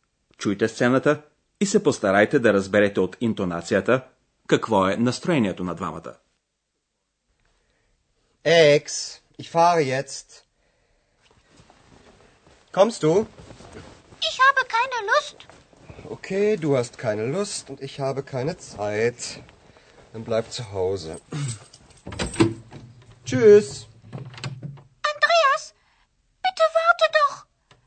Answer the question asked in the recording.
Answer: Екс е доста апатична, а Андреас е раздразнен.